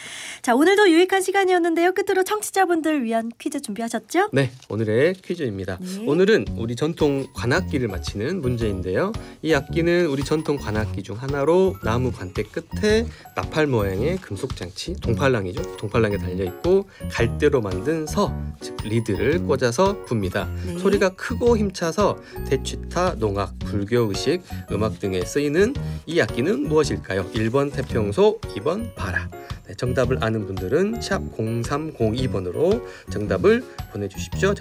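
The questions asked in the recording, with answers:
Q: 소리가 크고 힘차서 대취타, 농악, 불교의식, 음악 등에 쓰이는 이 악기는 무엇일까요?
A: 1: 태평소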